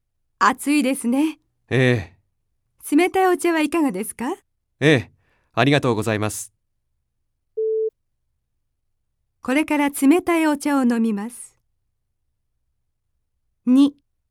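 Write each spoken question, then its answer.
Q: これから冷たいお茶を飲みます。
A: ○(正しい)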